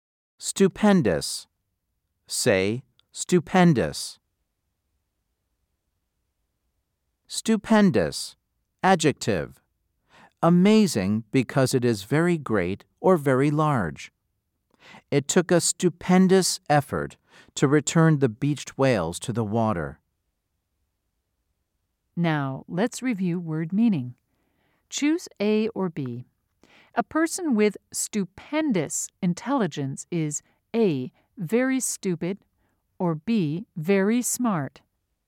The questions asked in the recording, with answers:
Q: Choose A or B. A person with stupendous intelligence is A, very stupid, or B, very smart.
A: If you said B, you are correct.